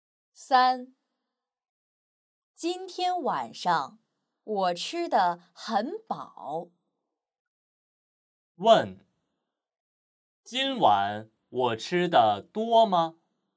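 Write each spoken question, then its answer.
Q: 问,今晚我吃的多吗?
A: 多,吃得很饱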